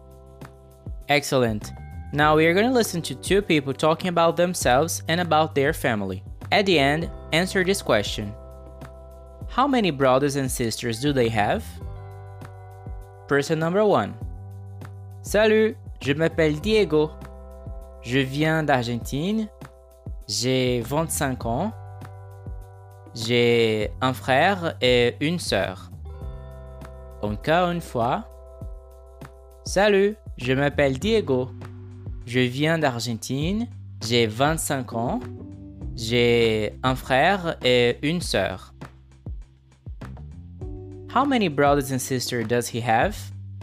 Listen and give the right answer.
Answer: Un frère et une sœur.